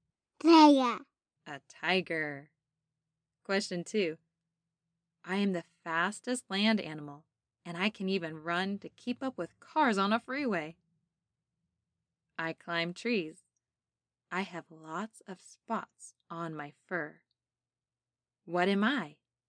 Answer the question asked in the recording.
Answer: Cheetah.